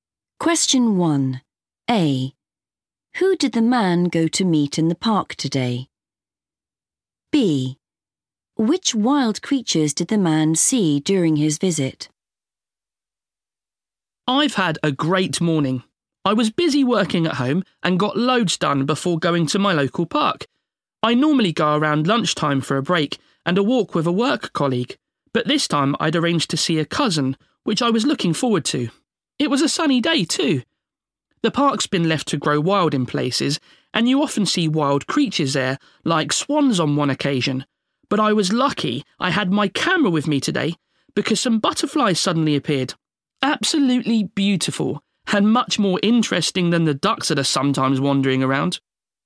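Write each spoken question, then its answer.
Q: Who did the man go to meet in the park today?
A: a cousin

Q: Which wild creatures did the man see during his visit?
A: butterflies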